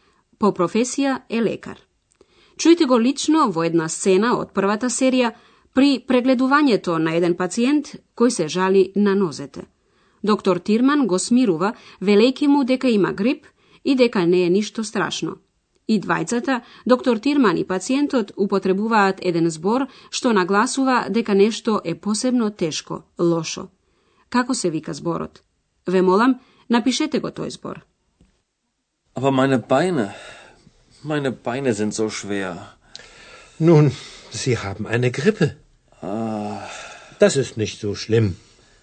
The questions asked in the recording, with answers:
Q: Како се вика зборот?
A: Како последно се бараше зборот зо.